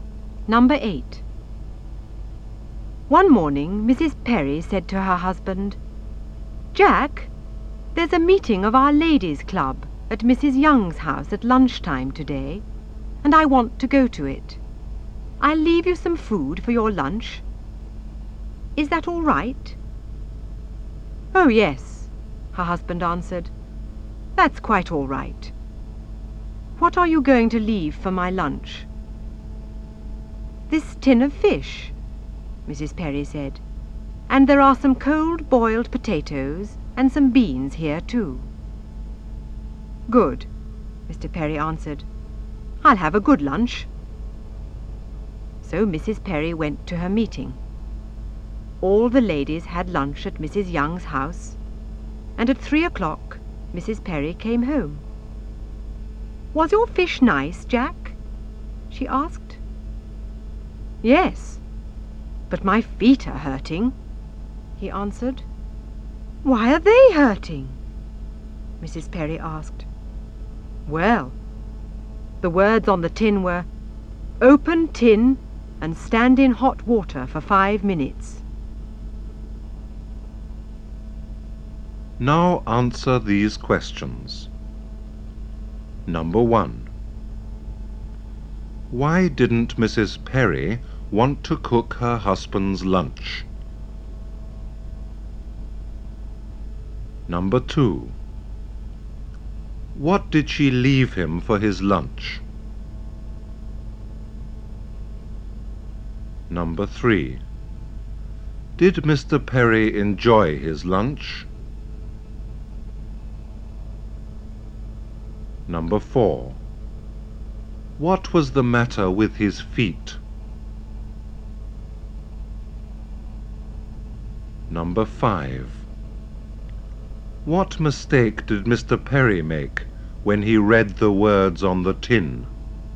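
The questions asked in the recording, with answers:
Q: Why didn't Mrs. Perry want to cook her husband's lunch?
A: She was going to a meeting of her ladies' club at Mrs. Young's house at lunchtime.

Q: What did she leave him for his lunch?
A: A tin of fish, some cold boiled potatoes and some beans.

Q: Did Mr. Perry enjoy his lunch?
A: Yes, but his feet were hurting.

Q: What was the matter with his feet?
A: They were hurting because he stood in hot water for 5 minutes.

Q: What mistake did Mr. Perry make when he read the words on the tin?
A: He thought he had to stand in the hot water himself, when the tin should stand in it.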